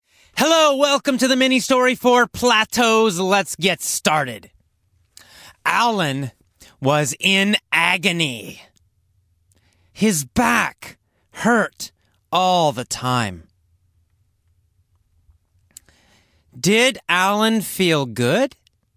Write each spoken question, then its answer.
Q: Did Alan feel good?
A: No. He felt terrible. He was in agony.